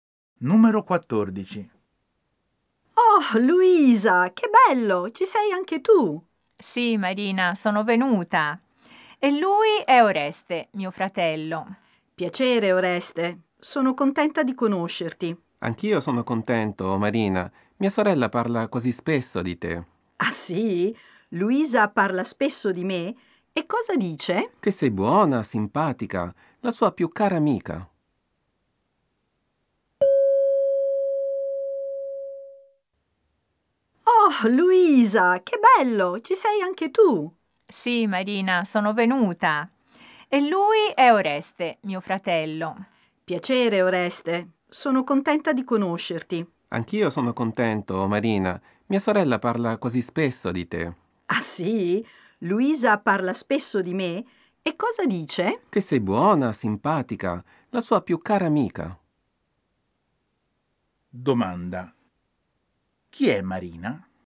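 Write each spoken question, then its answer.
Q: Chi è Marina?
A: La più cara amica di Luisa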